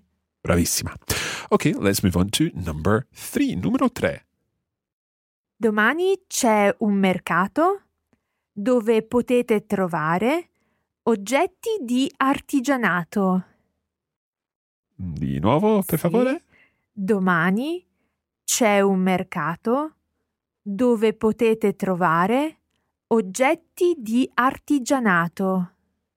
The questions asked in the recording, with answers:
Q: Domani c'è un mercato dove potete trovare oggetti di artigianato.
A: tomorrow there is a market where you can find crafts